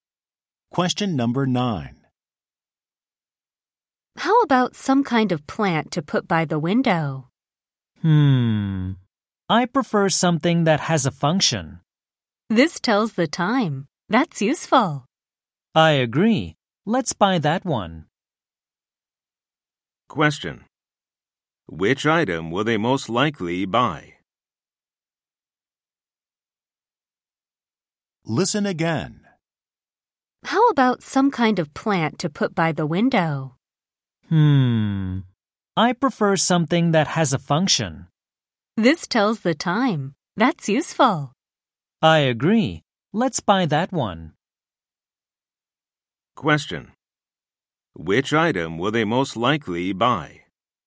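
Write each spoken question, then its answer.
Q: Which item will they most likely buy?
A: Something that tells the time (a clock)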